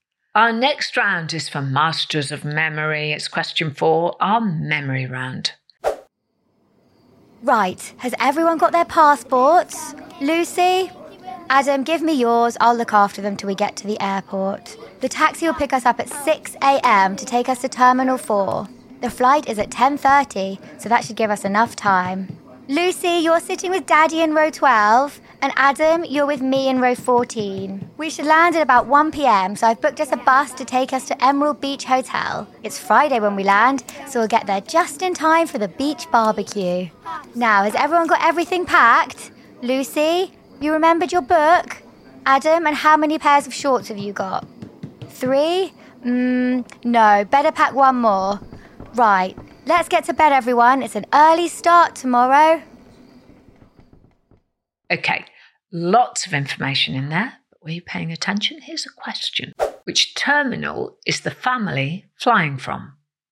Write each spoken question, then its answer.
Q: Which terminal is the family flying from?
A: Well, the answer is they're flying from Terminal 4.